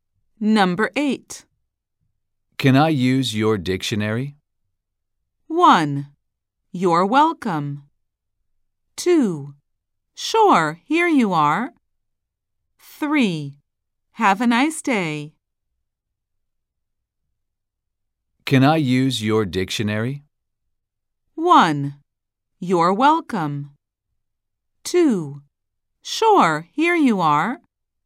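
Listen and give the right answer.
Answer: 2: Sure, here you are.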